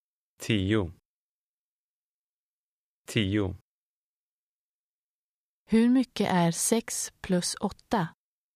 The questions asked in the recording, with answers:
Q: Hur mycket är 6 plus 8?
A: 14.